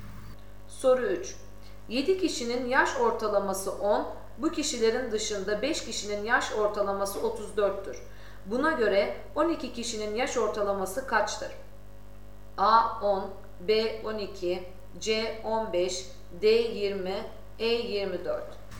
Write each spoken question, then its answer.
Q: Buna göre 12 kişinin yaş ortalaması kaçtır?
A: Doğru cevap D 20.